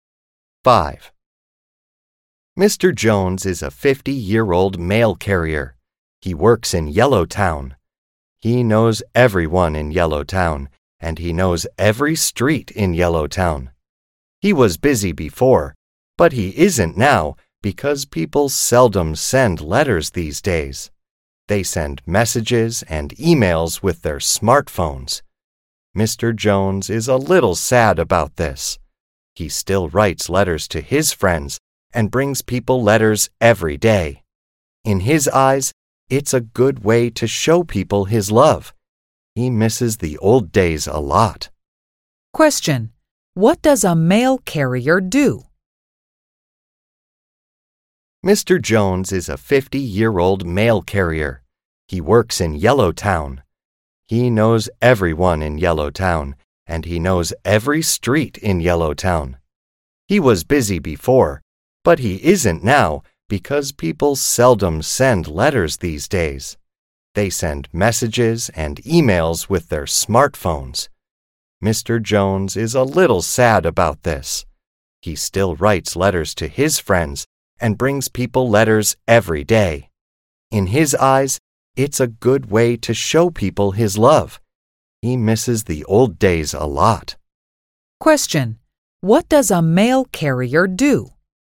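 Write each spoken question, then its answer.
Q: What does a mail carrier do?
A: Brings people letters.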